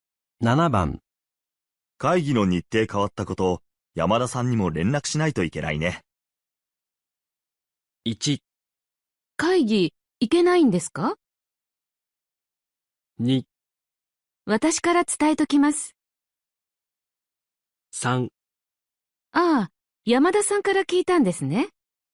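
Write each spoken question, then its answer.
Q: 会議の日程変わったこと、山田さんにも連絡しないといけないね。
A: 2: 私から伝えときます。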